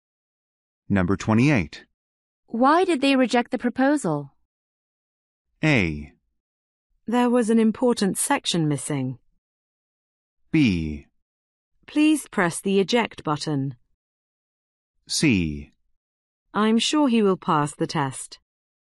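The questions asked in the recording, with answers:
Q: Why did they reject the proposal?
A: A: There was an important section missing.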